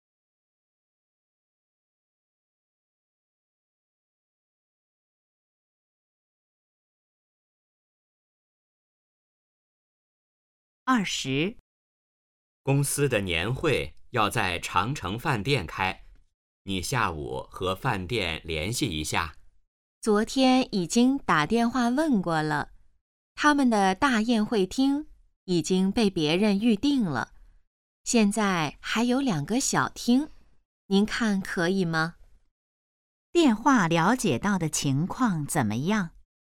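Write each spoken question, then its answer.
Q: 电话了解到的情况怎么样?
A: 大宴会厅已被预定,只剩2个小厅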